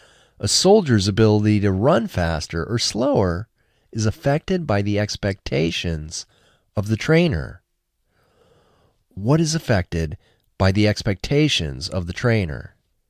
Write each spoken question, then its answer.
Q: What is affected by the expectations of the trainer?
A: A soldier's ability to run faster or slower is affected by the expectations of the trainer.